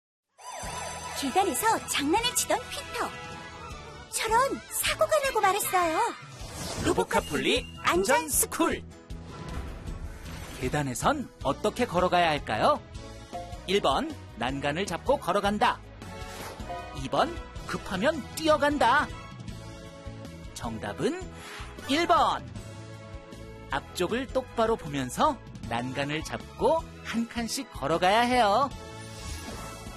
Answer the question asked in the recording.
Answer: 정답은 1번.